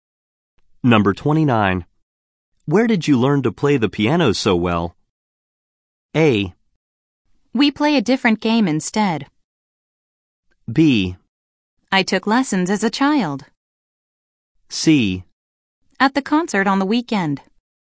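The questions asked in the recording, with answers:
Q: Where did you learn to play the piano so well?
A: B: I took lessons as a child.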